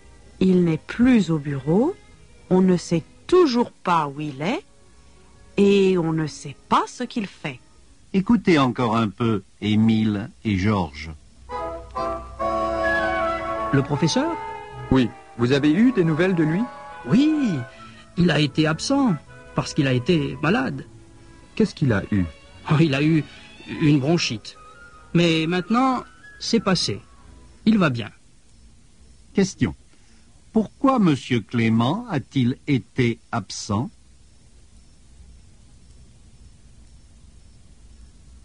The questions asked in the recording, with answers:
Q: Pourquoi M. Clément a-t-il été absent ?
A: Il a été absent parce qu'il a été malade.